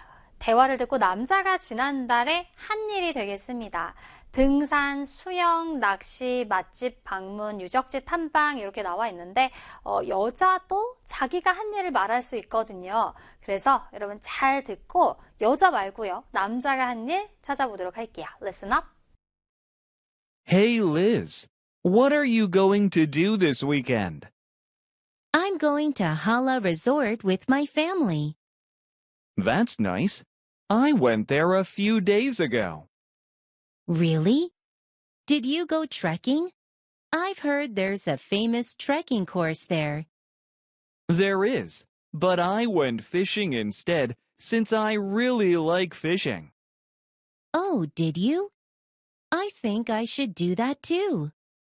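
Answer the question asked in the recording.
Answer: 낚시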